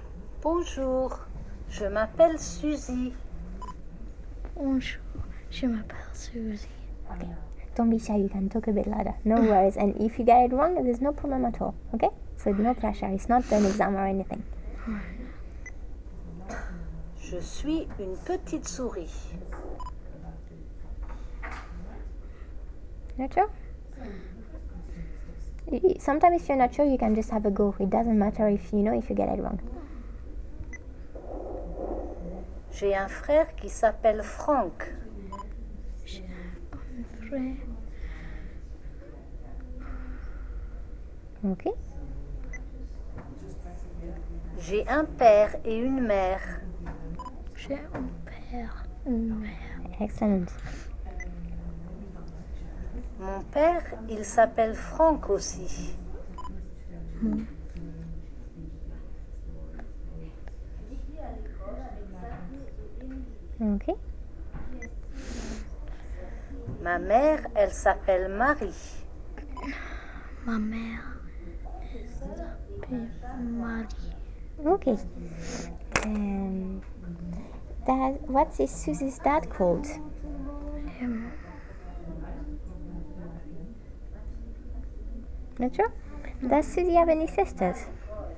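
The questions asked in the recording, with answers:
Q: Dad, what is Susie's dad called?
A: Franck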